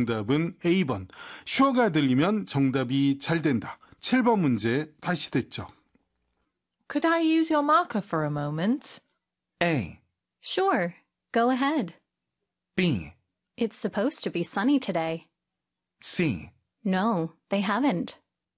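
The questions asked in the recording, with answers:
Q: Could I use your marker for a moment?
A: A: Sure. Go ahead.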